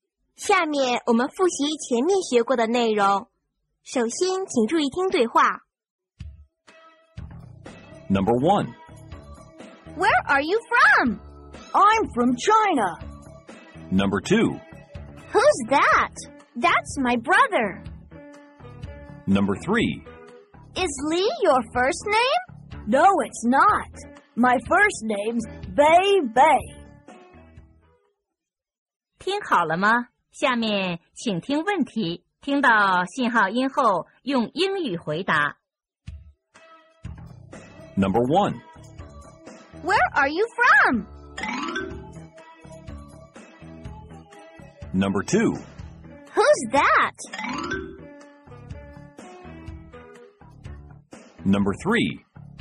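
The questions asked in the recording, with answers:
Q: Where are you from?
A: I'm from China.

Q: Who's that?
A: That's my brother.

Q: Is Lee your first name?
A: No, it's not. My first name's Bei Bei.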